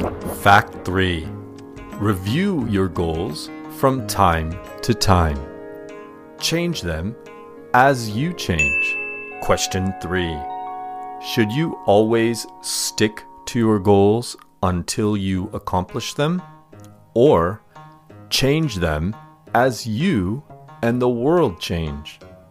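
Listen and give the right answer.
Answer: Change them as you change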